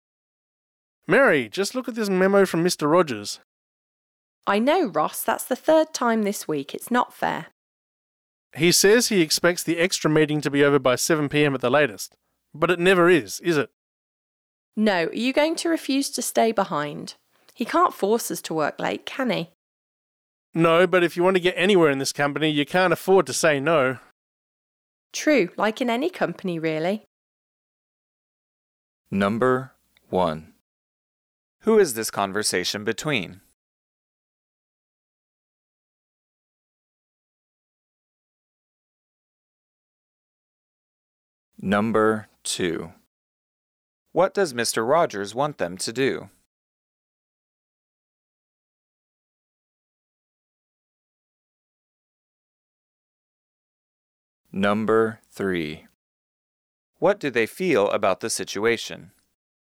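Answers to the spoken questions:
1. Two co-workers, Mary and Ross
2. Stay late for an extra meeting
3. It's unfair, but they can't afford to refuse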